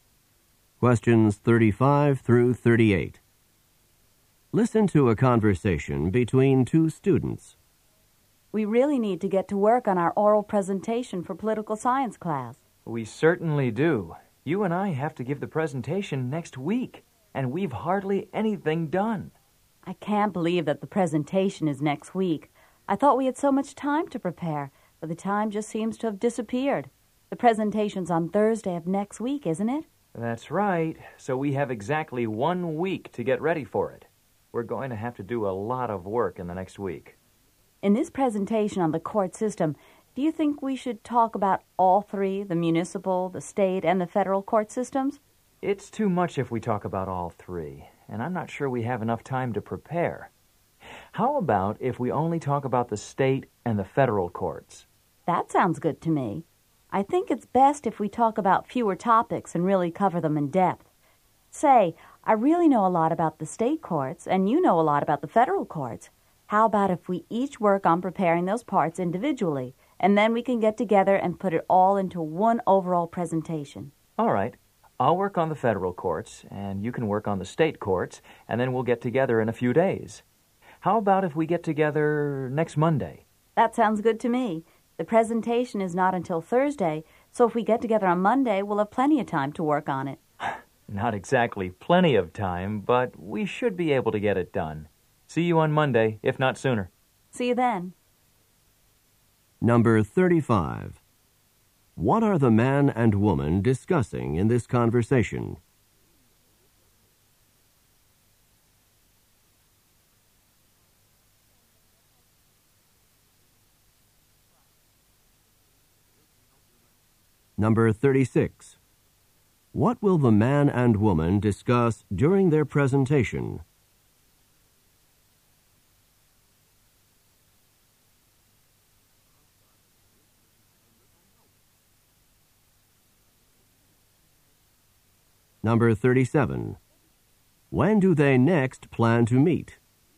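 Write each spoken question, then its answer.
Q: What are the man and woman discussing in this conversation?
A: Their oral presentation for political science class

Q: What will the man and woman discuss during their presentation?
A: The state and federal courts

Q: When do they next plan to meet?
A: Next Monday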